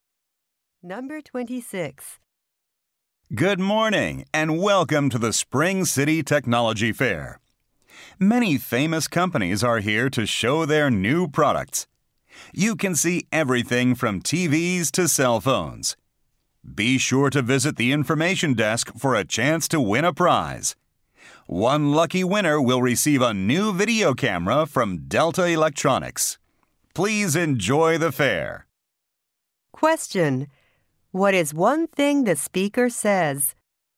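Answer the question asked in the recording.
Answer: Visitors can win a video camera at the information desk.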